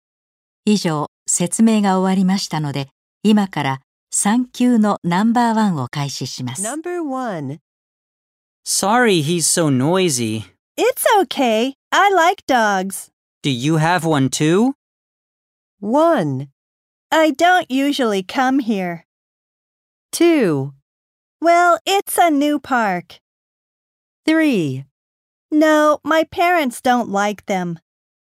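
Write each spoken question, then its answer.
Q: Do you have one too?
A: 3: No, my parents don't like them.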